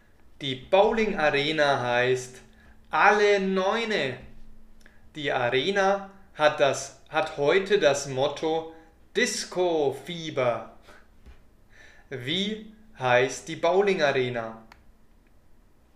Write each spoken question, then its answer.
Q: Wie heißt die Bowling Arena?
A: Sie heißt Alle Neune.